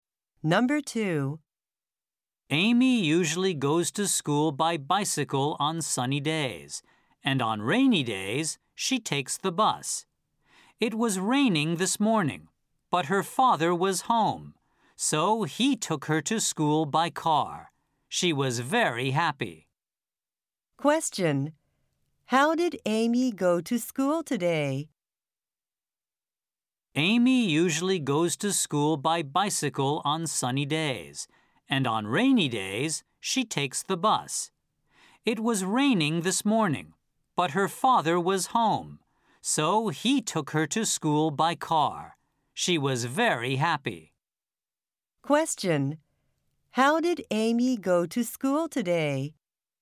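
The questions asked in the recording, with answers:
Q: How did Amy go to school today?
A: By car (her father took her).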